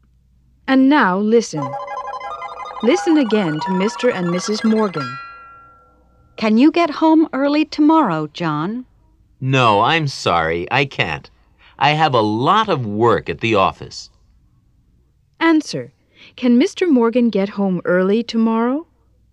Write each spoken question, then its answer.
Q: Can Mr. Morgan get home early tomorrow?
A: No, he can't.